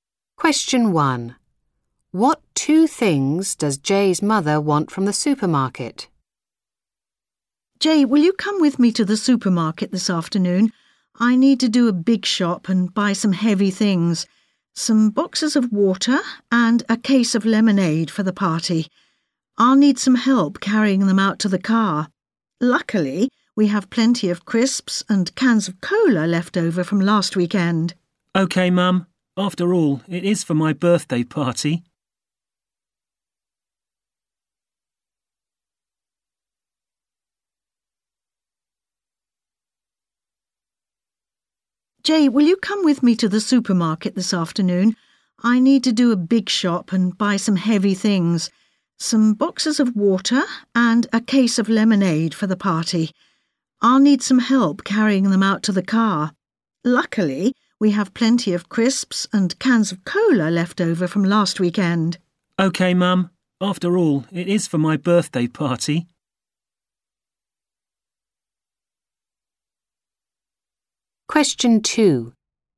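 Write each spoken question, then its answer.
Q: What two things does Jay's mother want from the supermarket?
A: Boxes of water and a case of lemonade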